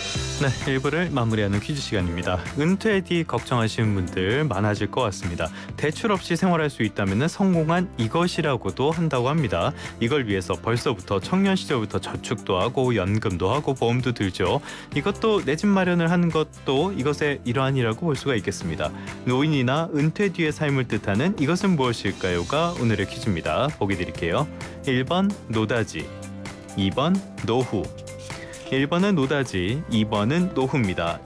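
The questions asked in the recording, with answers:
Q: 노인이나 은퇴 뒤의 삶을 뜻하는 이것은 무엇일까요가 오늘의 퀴즈입니다.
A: 2번: 노후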